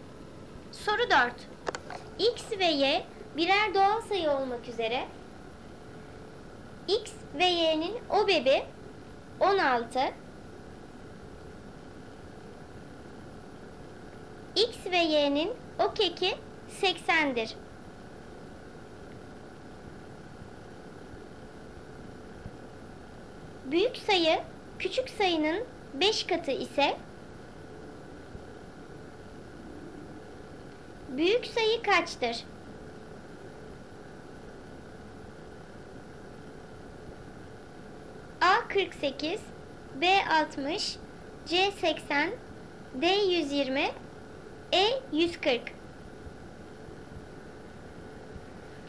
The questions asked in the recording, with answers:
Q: büyük sayı kaçtır?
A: Doğru cevap C 80.